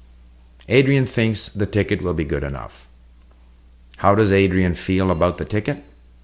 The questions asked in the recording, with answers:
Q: How does Adrian feel about the ticket?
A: He thinks the ticket will be good enough.